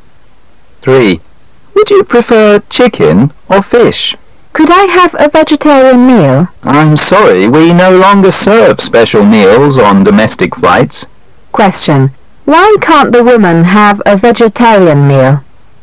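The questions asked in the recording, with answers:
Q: Why can't the woman have a vegetarian meal?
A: Special meals are no longer served on domestic flights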